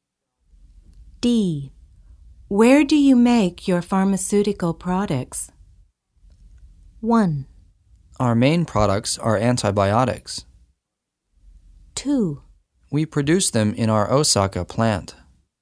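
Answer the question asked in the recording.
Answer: 2: We produce them in our Osaka plant.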